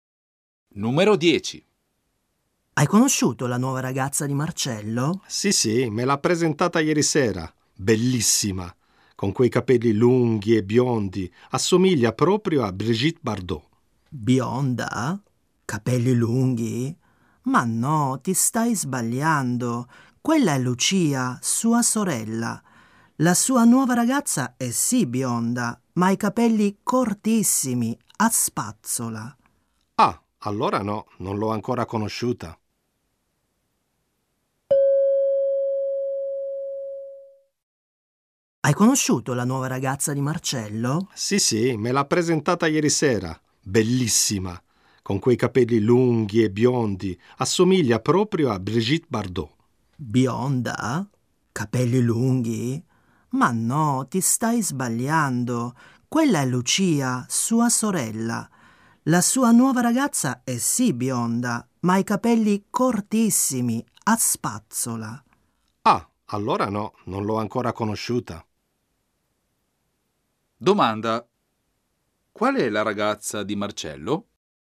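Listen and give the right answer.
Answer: Quella bionda con i capelli cortissimi, a spazzola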